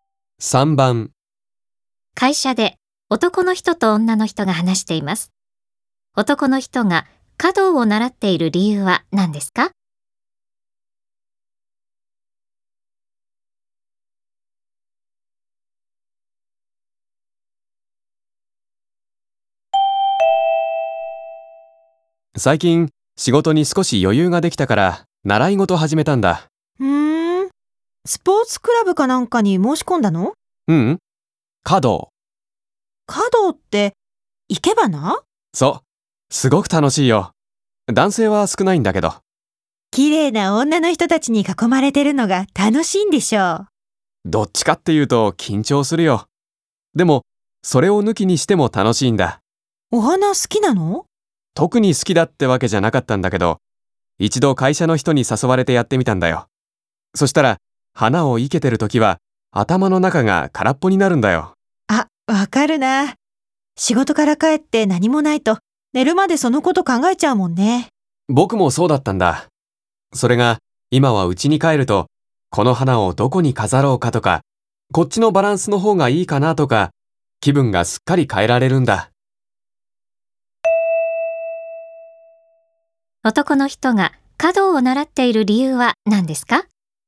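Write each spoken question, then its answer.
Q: 男の人が華道を習っている理由は何ですか?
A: 花を生けていると仕事のことを忘れて気分を変えられるから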